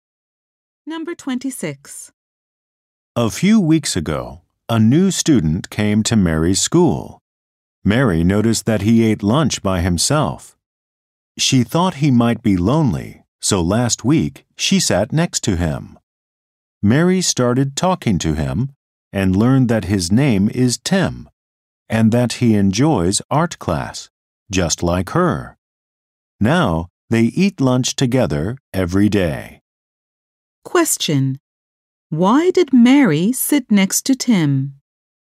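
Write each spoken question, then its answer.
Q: Why did Mary sit next to Tim?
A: She thought he might be lonely.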